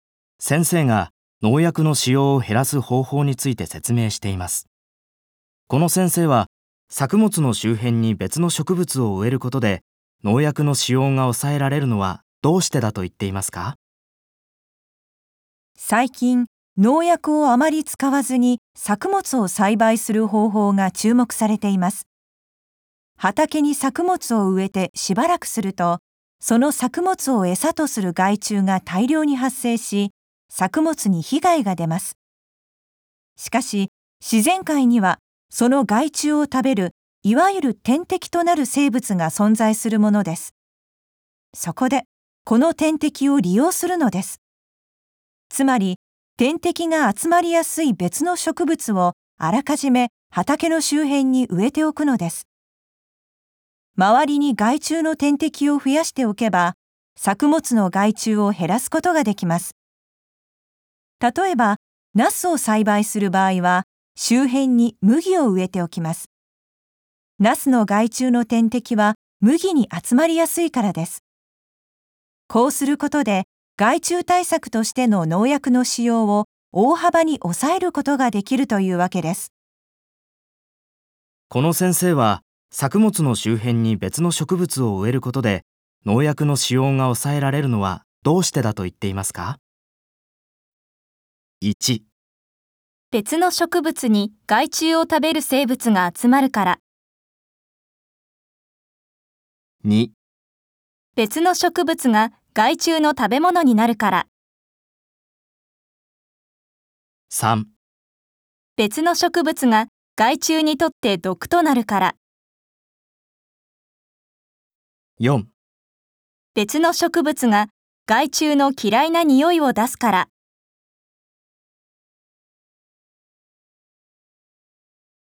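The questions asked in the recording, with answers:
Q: この先生は、作物の周辺に別の植物を植えることで農薬の使用が抑えられるのはどうしてだと言っていますか?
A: 1: 別の植物に害虫を食べる生物が集まるから。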